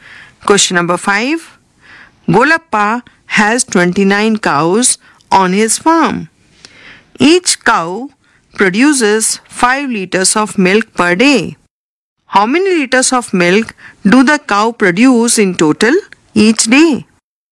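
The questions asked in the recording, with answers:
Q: How many liters of milk do the cow produce in total each day?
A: 145 liters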